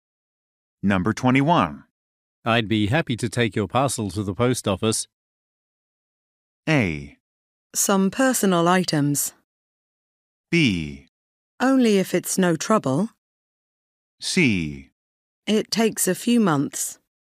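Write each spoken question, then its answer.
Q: I'd be happy to take your parcel to the post office.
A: B: Only if it's no trouble.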